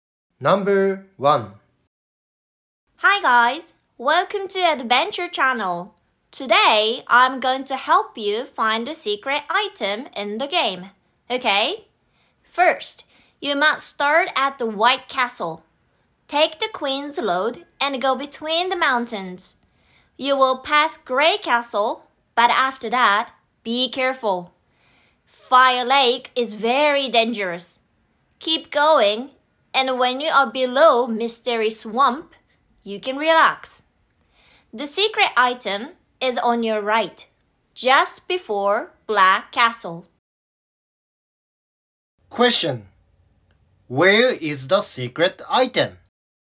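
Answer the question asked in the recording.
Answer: On your right, just before Black Castle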